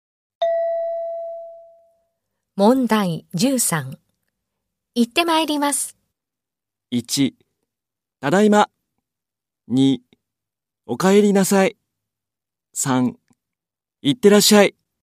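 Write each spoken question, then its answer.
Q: 行ってまいります。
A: 1: 行ってらっしゃい。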